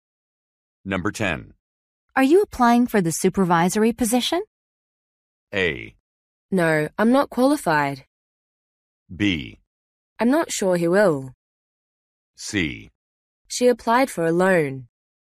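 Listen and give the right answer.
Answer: A: No, I'm not qualified.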